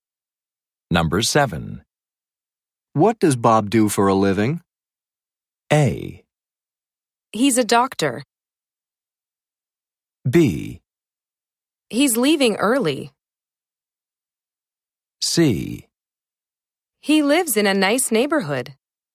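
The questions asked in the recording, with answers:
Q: What does Bob do for a living?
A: A: He's a doctor.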